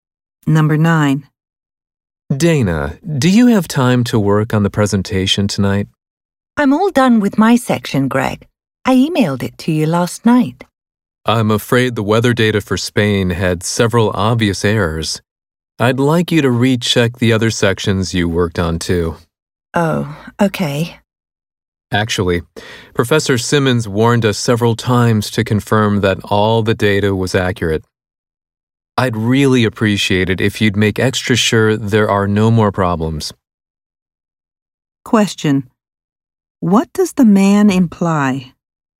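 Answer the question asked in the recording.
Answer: Dana's section had errors, so she did not check her data carefully enough and must recheck it.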